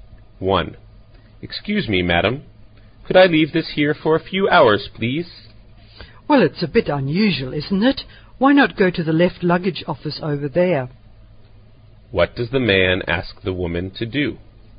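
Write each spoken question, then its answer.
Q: What does the man ask the woman to do?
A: Look after his luggage for a few hours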